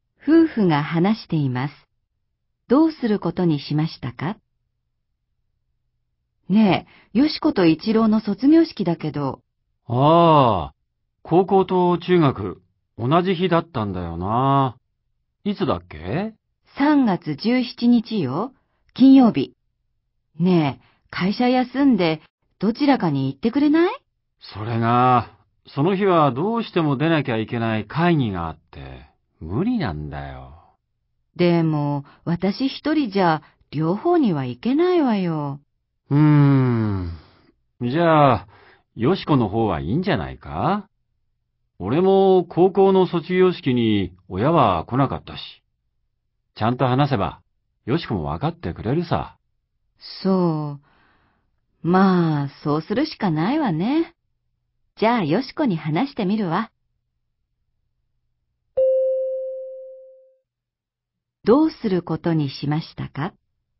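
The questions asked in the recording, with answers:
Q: どうすることにしましたか?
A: 妻が一郎の中学の卒業式だけに行き、よしこの高校の卒業式には誰も行かない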